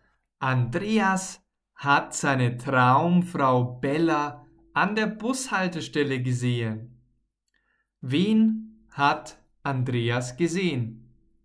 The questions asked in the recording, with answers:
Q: Wen hat Andreas gesehen?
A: Seine Traumfrau, na klar, er hat seine Traumfrau Bella gesehen.